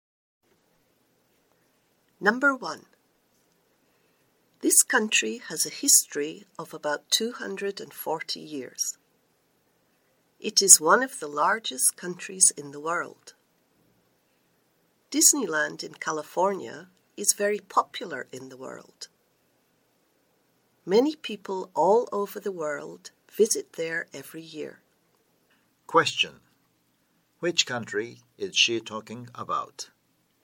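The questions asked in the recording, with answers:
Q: Which country is she talking about?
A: The United States (America)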